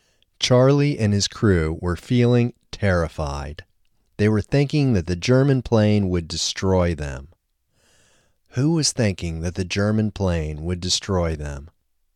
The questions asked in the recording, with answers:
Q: Who was thinking that the German plane would destroy them?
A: Charlie and his crew were thinking that the German plane would destroy them.